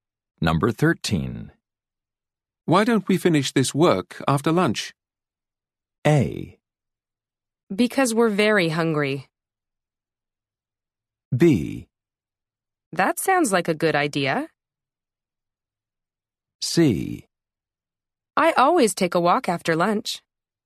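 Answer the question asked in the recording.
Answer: B: That sounds like a good idea.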